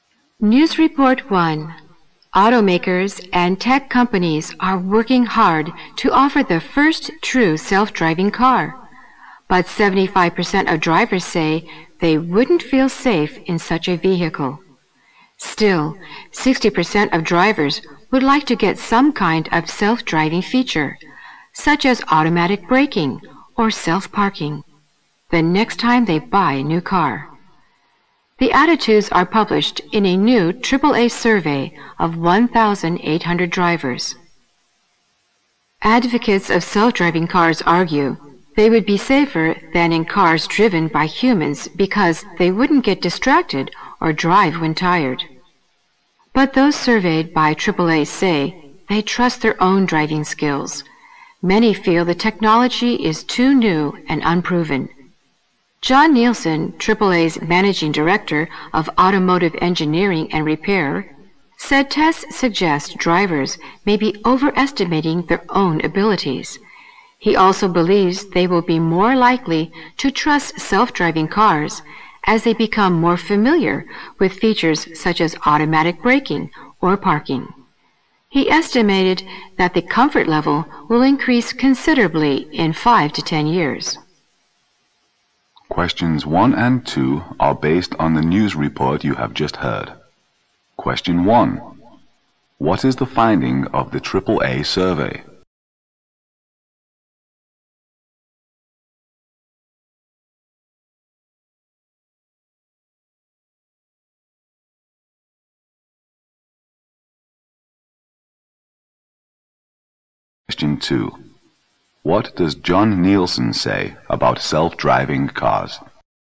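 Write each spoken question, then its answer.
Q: What is the finding of the AAA survey?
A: Most drivers (75%) wouldn't feel safe in a self-driving car

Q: What does John Nielsen say about self-driving cars?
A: Drivers will trust them more as they become familiar with features like automatic braking or parking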